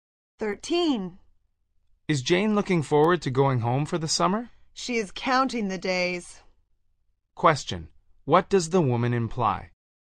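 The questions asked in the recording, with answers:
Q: What does the woman imply?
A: Jane is eager to go home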